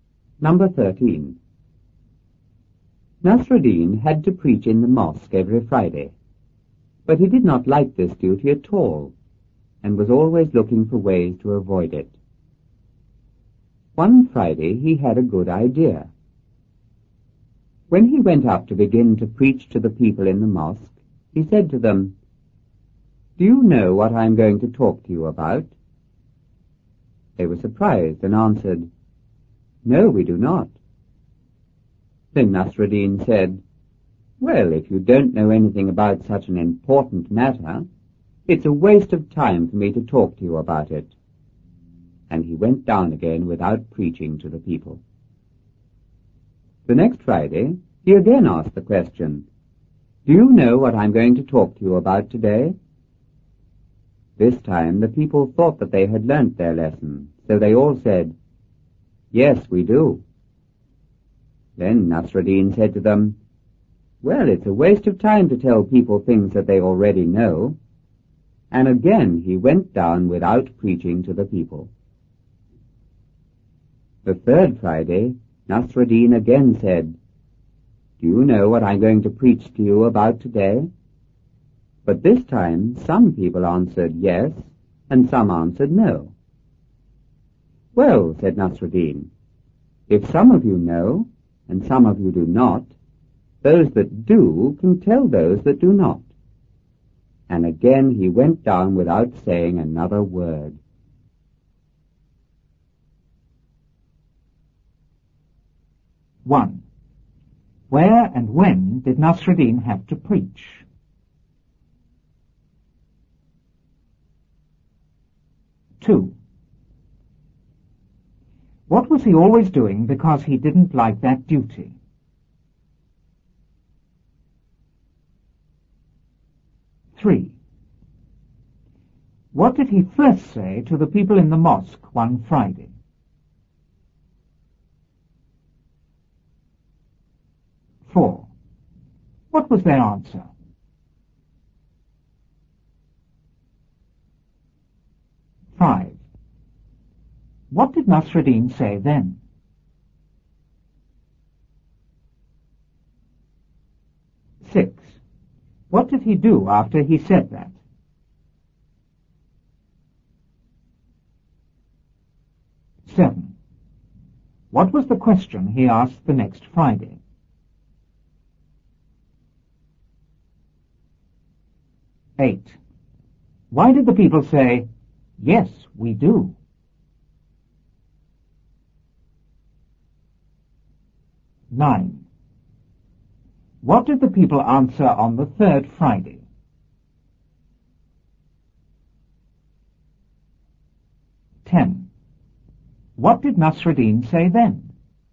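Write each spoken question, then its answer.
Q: Where and when did Nasruddin have to preach?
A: In the mosque every Friday

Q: What was he always doing because he didn't like that duty?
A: Looking for ways to avoid it

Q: What did he first say to the people in the mosque one Friday?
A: "Do you know what I am going to talk to you about?"

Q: What was their answer?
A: "No, we do not."

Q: What did Nasruddin say then?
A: If you don't know anything about such an important matter, it's a waste of time for me to talk to you about it.

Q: What did he do after he said that?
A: He went down again without preaching

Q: What was the question he asked the next Friday?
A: "Do you know what I'm going to talk to you about today?"

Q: Why did the people say, "Yes, we do"?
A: They thought they had learnt their lesson

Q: What did the people answer on the third Friday?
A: Some answered yes and some answered no

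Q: What did Nasruddin say then?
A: Those that know can tell those that do not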